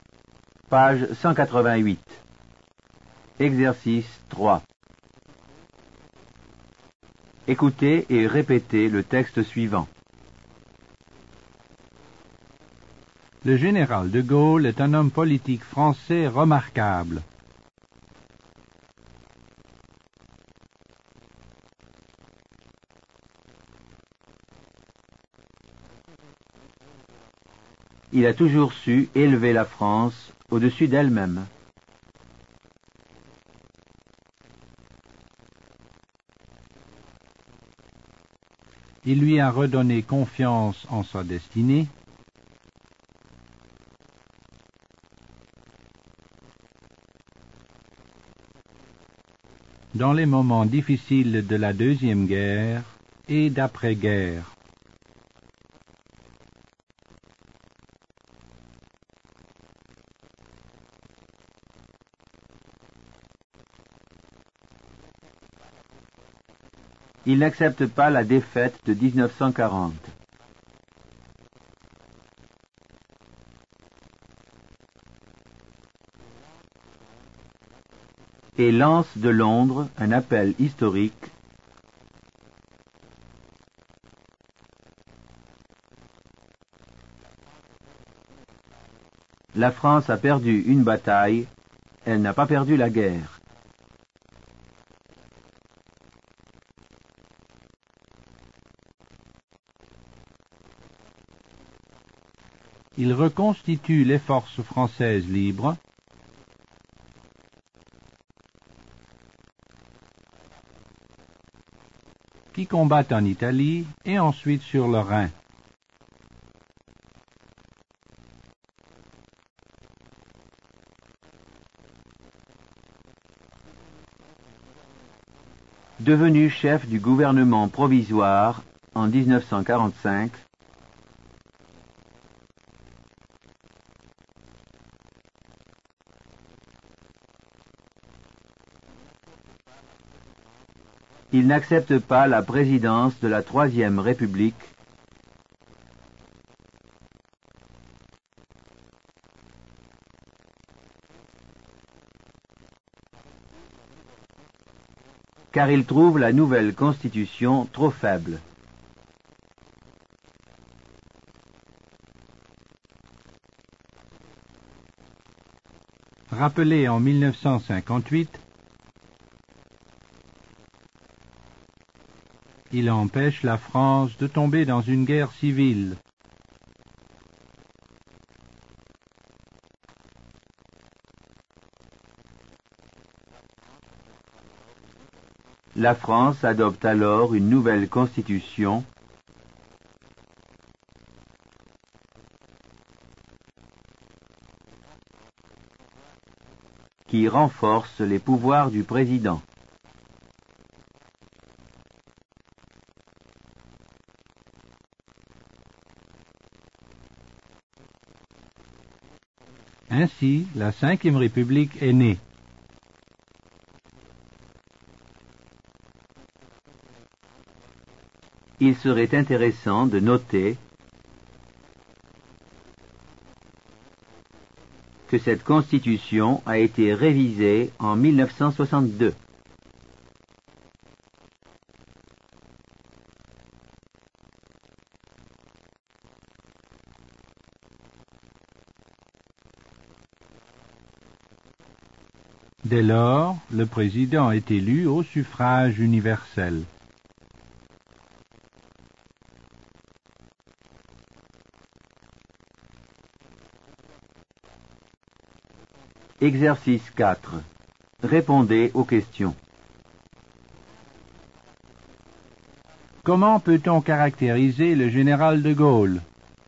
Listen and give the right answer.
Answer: Le général de Gaulle est un homme politique français remarquable.